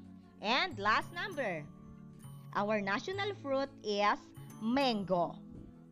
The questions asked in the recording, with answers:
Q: our national fruit is mango.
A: Okay, it is a fact.